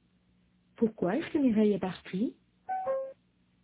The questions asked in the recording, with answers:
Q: Pourquoi est-ce que Mireille est partie ?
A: Parce qu'elle est allée chez elle pour déjeuner.